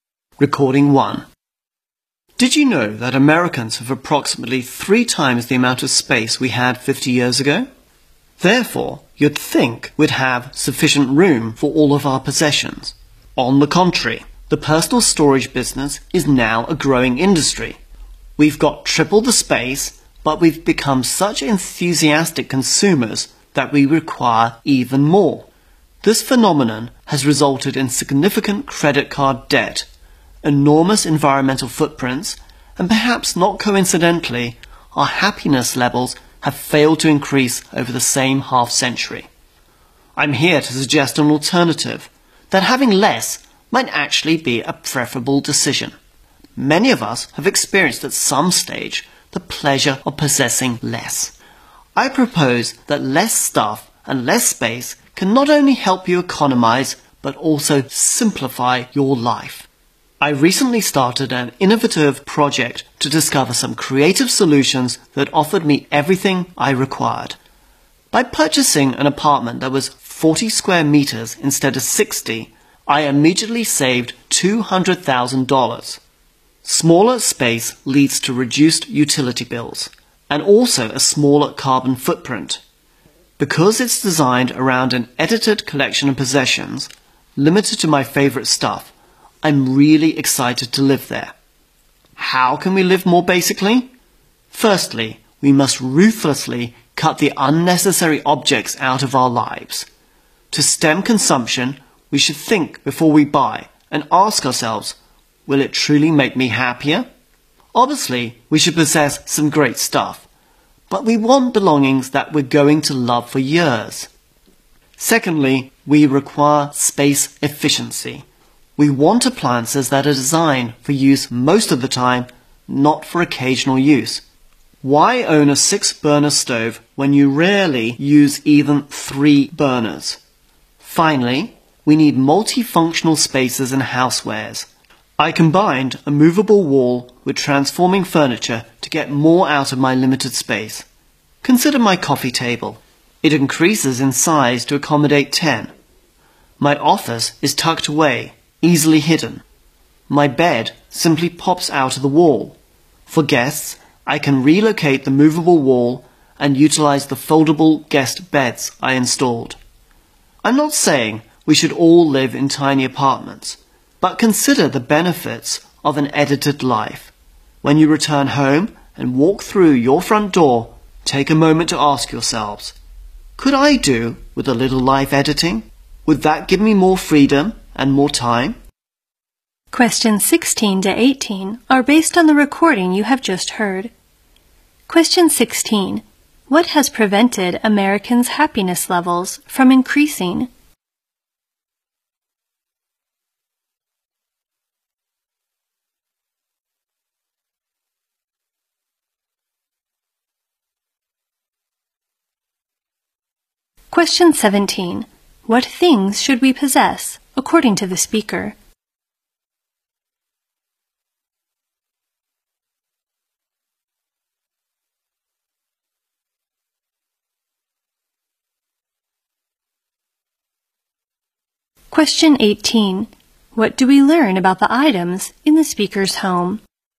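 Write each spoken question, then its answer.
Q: What things should we possess, according to the speaker?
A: Things we're going to love for years.

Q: What do we learn about the items in the speaker's home?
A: They are multifunctional and can be transformed.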